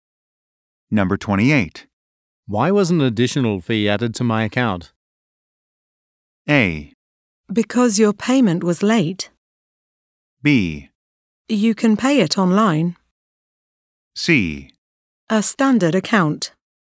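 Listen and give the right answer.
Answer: A: Because your payment was late.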